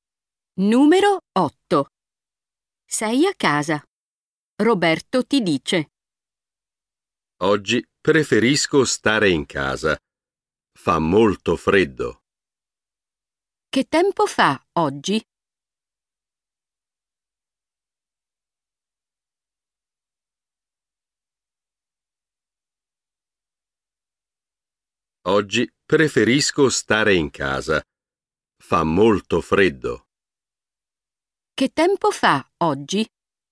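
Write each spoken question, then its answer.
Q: Che tempo fa oggi?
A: Fa molto freddo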